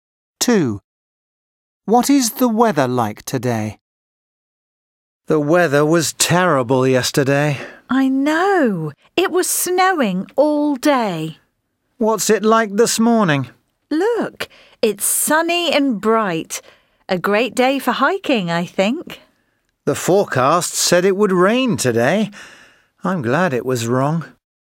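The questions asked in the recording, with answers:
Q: What is the weather like today?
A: sunny and bright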